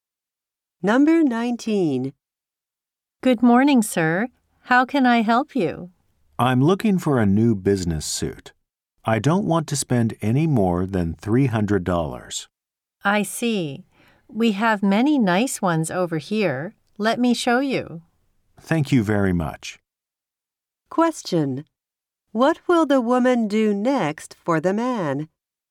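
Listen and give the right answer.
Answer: Show him some business suits.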